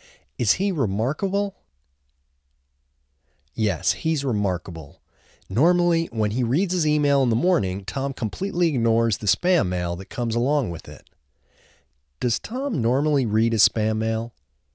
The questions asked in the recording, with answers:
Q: Does Tom normally read his spam mail?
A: No, Tom doesn't normally read his spam mail.